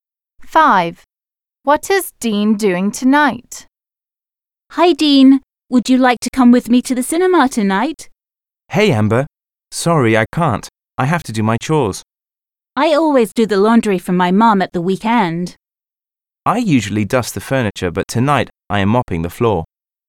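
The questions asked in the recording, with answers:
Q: What is Dean doing tonight?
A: Mopping the floor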